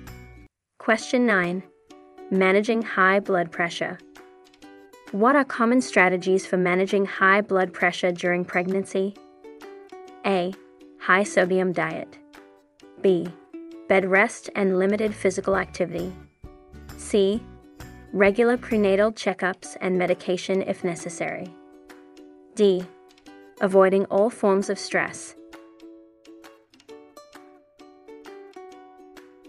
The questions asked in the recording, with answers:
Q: What are common strategies for managing high blood pressure during pregnancy?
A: The correct answer is C. Regular prenatal checkups and medication if necessary.